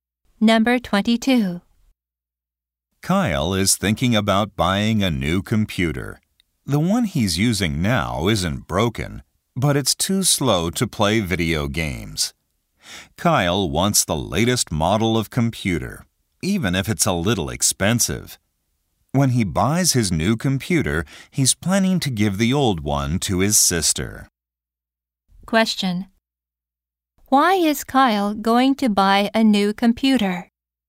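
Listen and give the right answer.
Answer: His computer is too slow for video games.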